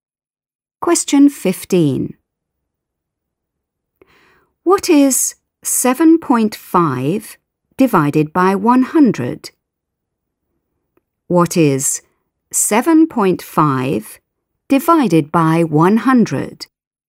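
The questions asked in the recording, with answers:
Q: What is 7.5 divided by 100?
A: 0.075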